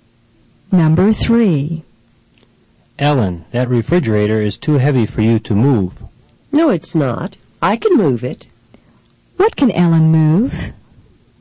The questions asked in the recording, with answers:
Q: What can Ellen move?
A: The answer is, she can move the refrigerator.